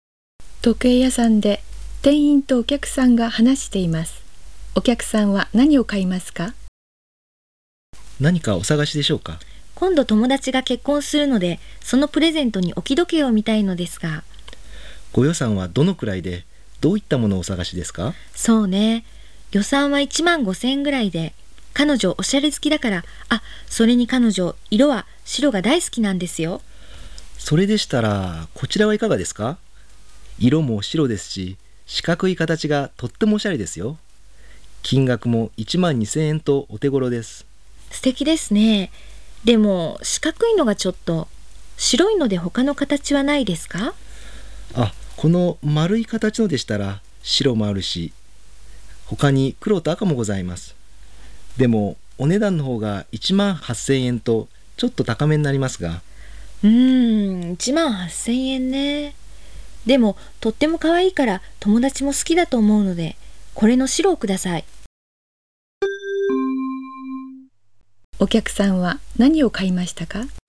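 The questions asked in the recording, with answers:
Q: お客さんは何を買いましたか?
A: 白い丸い形の置き時計(18,000円)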